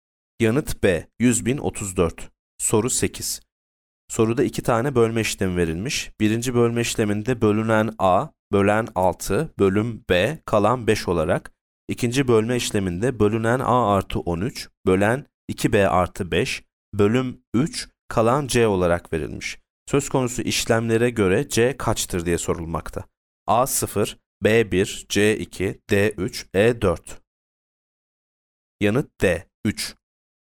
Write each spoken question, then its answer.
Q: Söz konusu işlemlere göre C kaçtır diye sorulmakta.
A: Yanıt D 3.